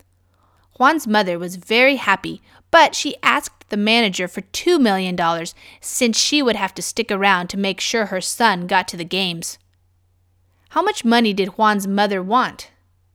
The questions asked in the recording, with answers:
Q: How much money did Juan's mother want?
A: She wanted $2 million.